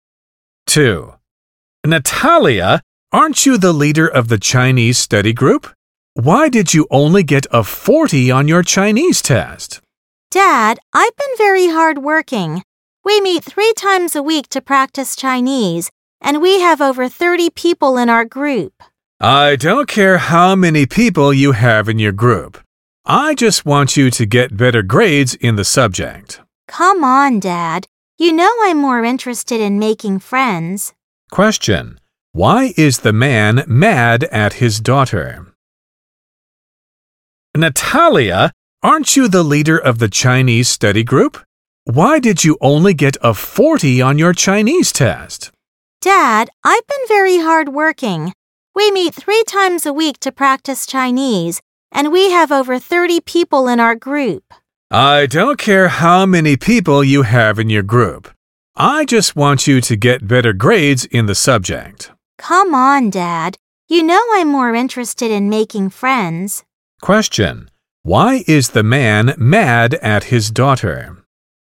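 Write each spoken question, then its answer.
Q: Why is the man mad at his daughter?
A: She only got 40 on her Chinese test.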